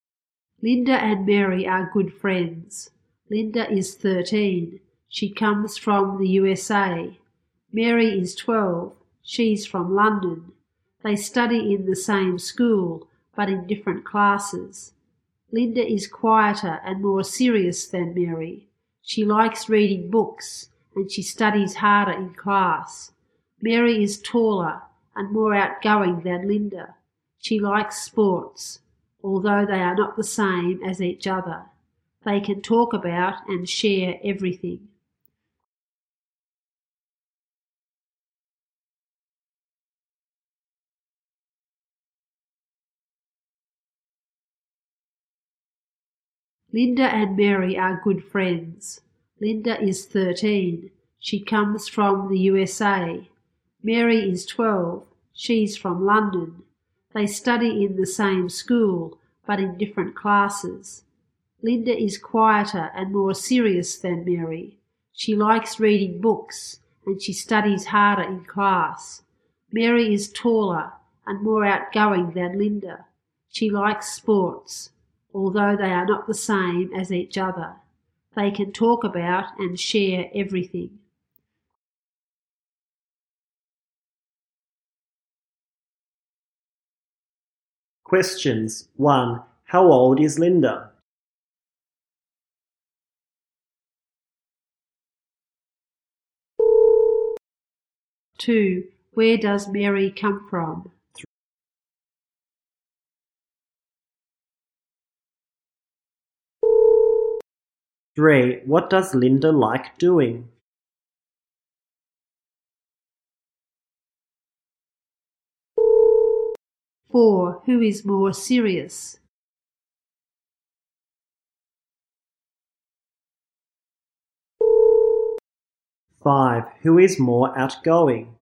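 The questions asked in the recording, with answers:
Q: How old is Linda?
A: 13

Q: Where does Mary come from?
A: London

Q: What does Linda like doing?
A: Reading books

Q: Who is more serious?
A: Linda

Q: Who is more outgoing?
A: Mary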